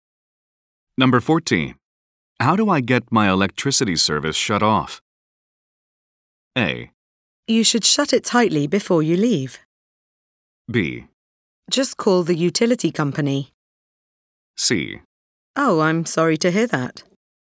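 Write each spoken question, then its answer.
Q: How do I get my electricity service shut off?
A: B: Just call the utility company.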